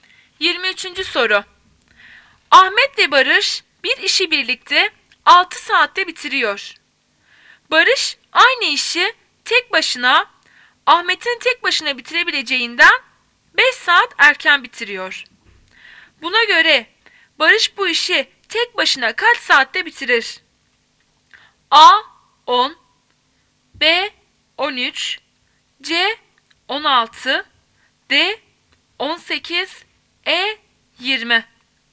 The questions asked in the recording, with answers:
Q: Buna göre Barış bu işi tek başına kaç saatte bitirir?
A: Cevap A 10.